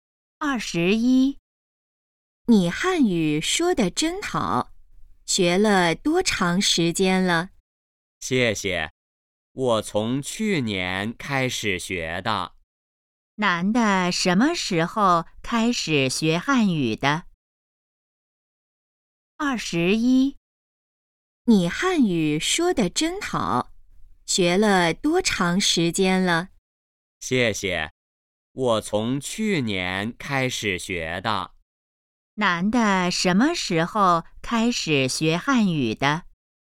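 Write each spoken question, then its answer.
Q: 男的什么时候开始学汉语的?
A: 去年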